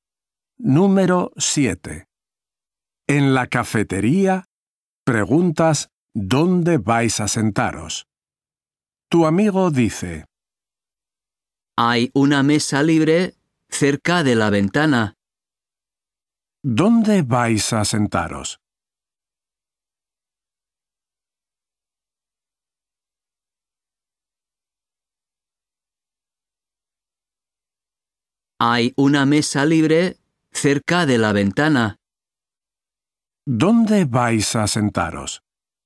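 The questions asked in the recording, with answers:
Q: ¿Dónde vais a sentaros?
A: En una mesa cerca de la ventana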